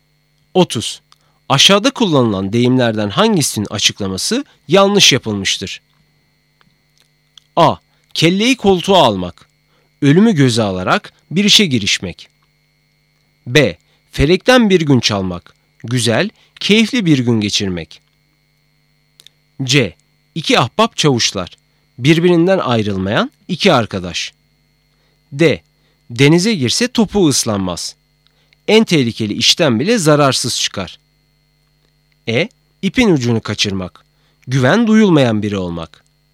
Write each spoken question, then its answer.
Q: Aşağıda kullanılan deyimlerden hangisinin açıklaması yanlış yapılmıştır?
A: Doğru cevap E, ipin ucunu kaçırmak, güven duyulmayan biri olmak.